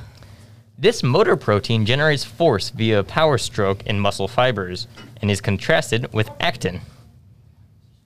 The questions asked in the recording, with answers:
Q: This motor protein generates force via a power stroke in muscle fibers and is contrasted with actin.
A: Myosin.